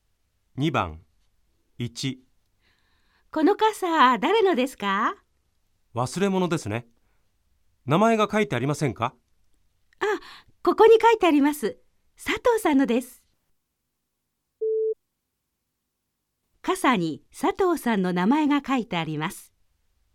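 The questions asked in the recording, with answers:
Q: 傘に佐藤さんの名前が書いてあります。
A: 〇(正しい)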